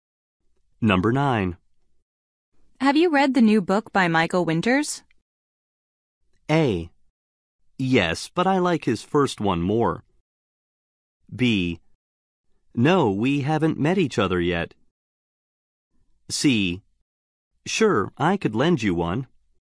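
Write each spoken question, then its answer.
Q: Have you read the new book by Michael Winters?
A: A: Yes, but I like his first one more.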